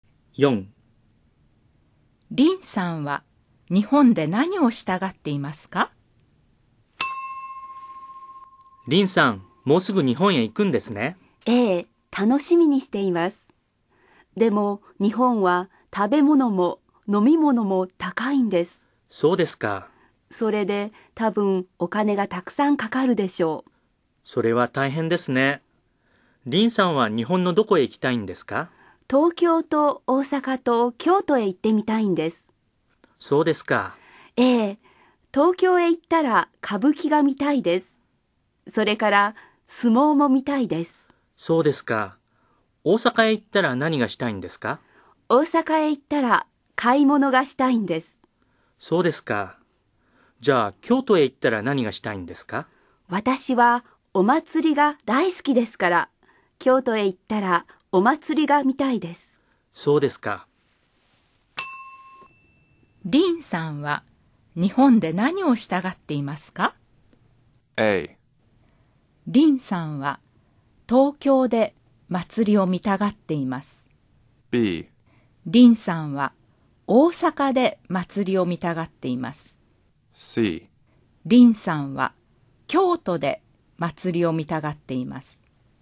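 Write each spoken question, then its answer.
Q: リンさんは日本で何をしたがっていますか?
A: C: リンさんは京都で祭りを見たがっています。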